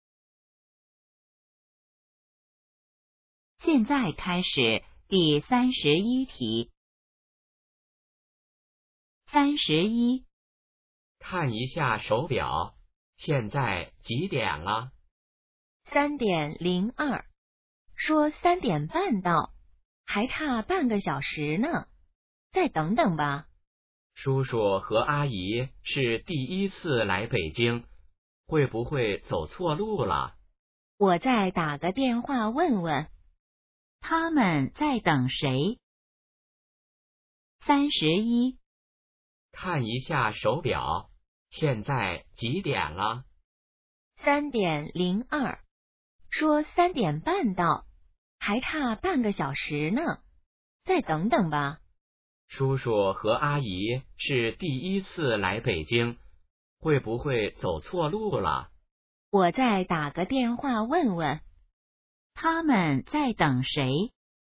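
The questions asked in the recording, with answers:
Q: 他们在等谁?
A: 叔叔和阿姨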